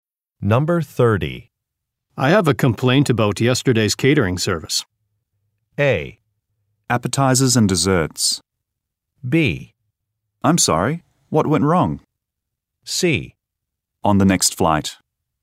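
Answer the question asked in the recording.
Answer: B: I'm sorry, what went wrong?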